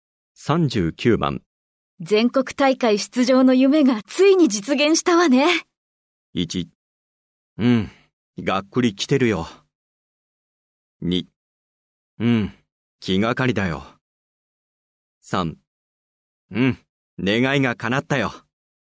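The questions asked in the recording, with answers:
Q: 全国大会出場の夢がついに実現したわね。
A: 3: うん、願いが叶ったよ。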